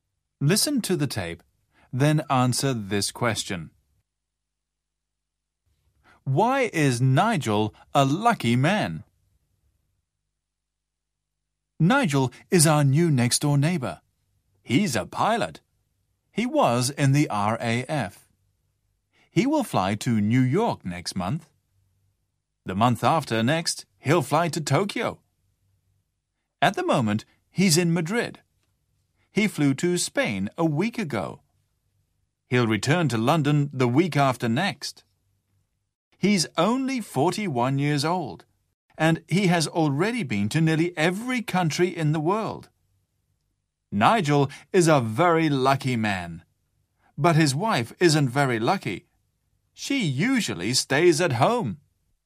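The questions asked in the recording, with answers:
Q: Why is Nigel a lucky man?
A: He's a pilot and has already been to nearly every country in the world.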